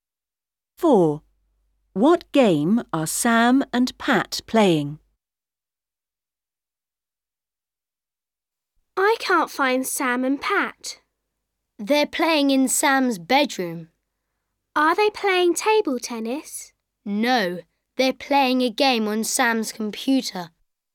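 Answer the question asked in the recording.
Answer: A computer game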